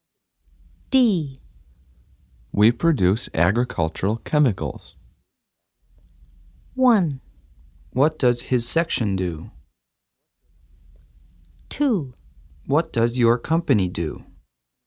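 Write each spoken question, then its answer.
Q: We produce agricultural chemicals.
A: 2: What does your company do?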